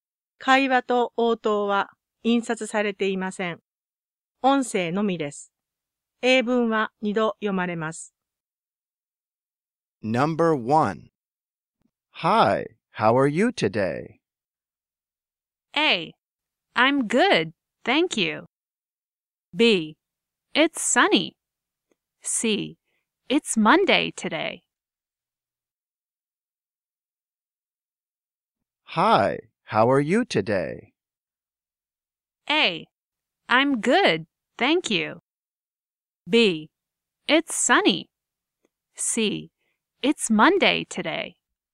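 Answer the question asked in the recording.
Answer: A: I'm good, thank you.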